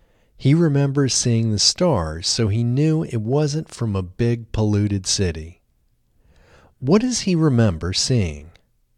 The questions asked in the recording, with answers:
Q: What does he remember seeing?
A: He remembers seeing stars.